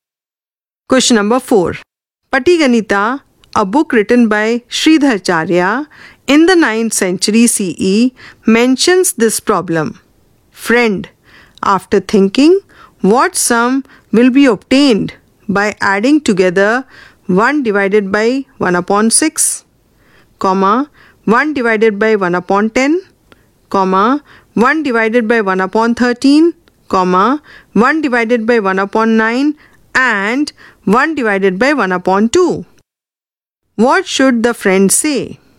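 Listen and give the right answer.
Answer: 40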